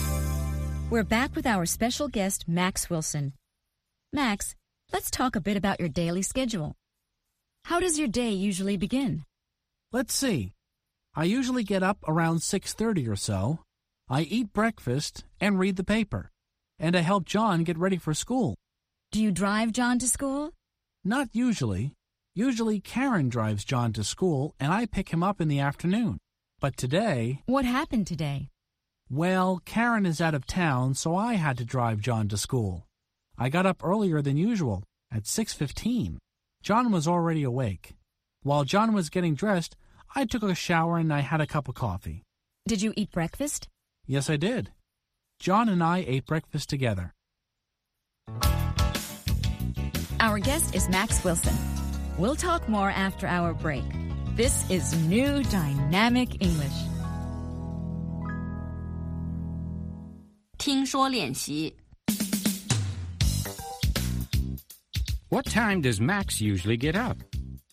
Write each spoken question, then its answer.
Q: What time does Max usually get up?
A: He usually gets up around 6:30.